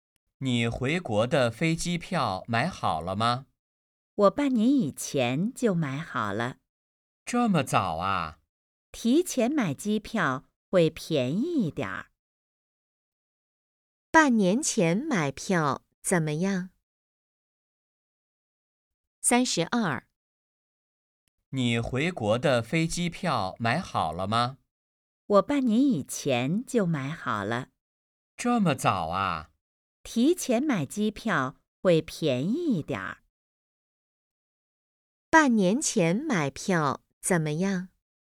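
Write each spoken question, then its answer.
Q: 半年前买票怎么样?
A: 便宜一点儿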